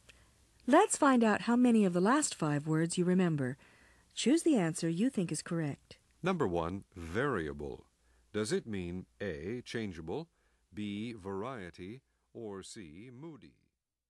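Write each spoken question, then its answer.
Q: Number one, variable. Does it mean A, changeable, B, variety, or C, moody?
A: A: changeable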